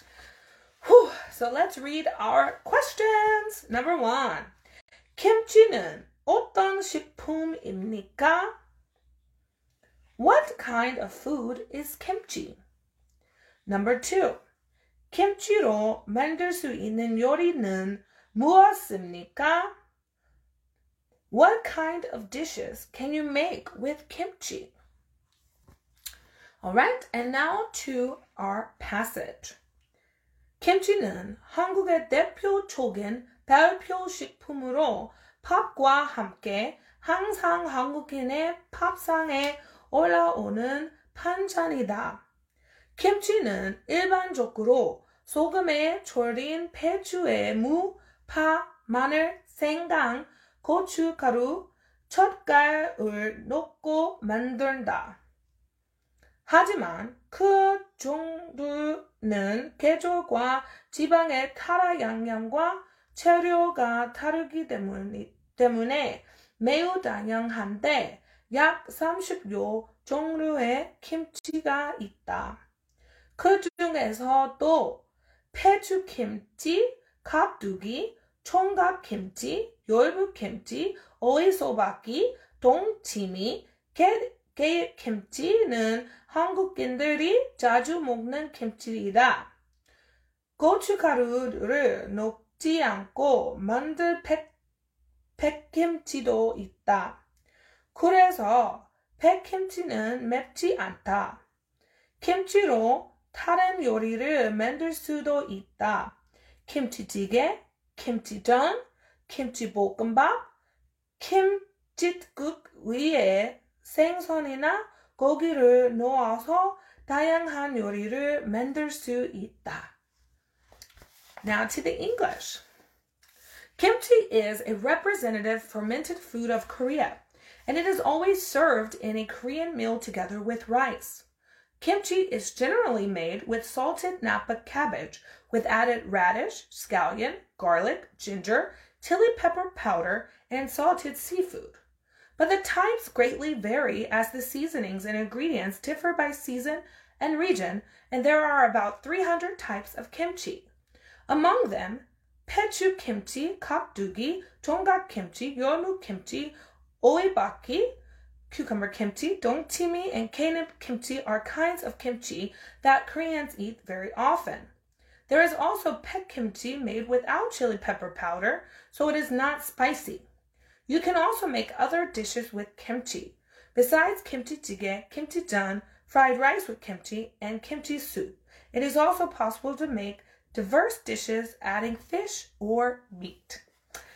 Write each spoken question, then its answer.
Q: 김치는 어떤 식품입니까?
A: 발효 식품입니다. It is a fermented food.

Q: 김치로 만들 수 있는 요리는 무엇입니까?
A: 김치찌개, 김치전, 김치볶음밥, 김칫국 등이 있습니다.